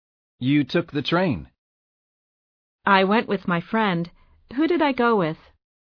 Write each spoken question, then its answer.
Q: Who did I go with?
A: You went with your friend.